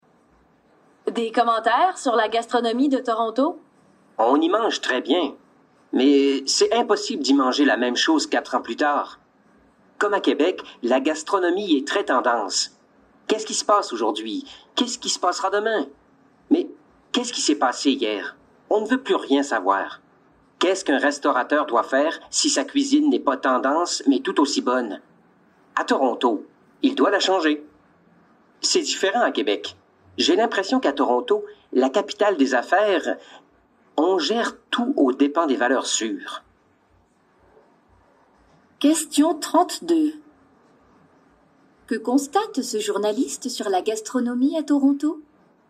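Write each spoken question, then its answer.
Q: Que constate ce journaliste sur la gastronomie à Toronto?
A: Elle suit les tendances et change sans cesse : on y mange très bien, mais jamais la même chose quelques années plus tard.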